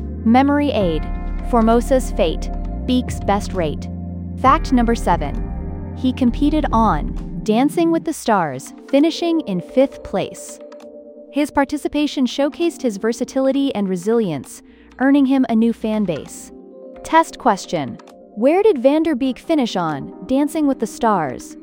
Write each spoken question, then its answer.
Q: Where did Van Der Beek finish on Dancing with the Stars?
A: Correct answer. 5th place.